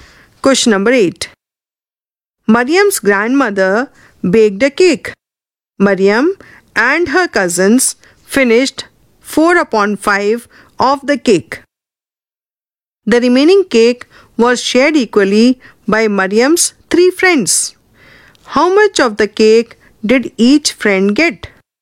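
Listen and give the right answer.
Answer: 1/15 of the cake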